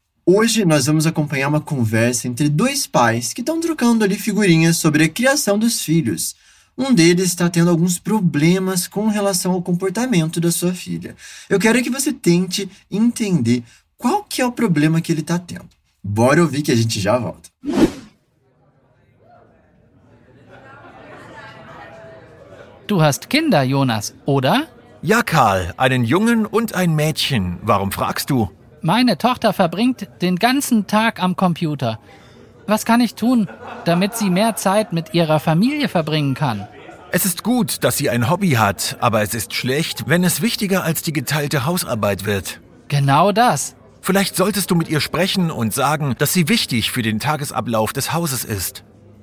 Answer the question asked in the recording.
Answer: A filha de um dos homens passa o dia inteiro no computador e isso acaba prejudicando algumas coisas em casa.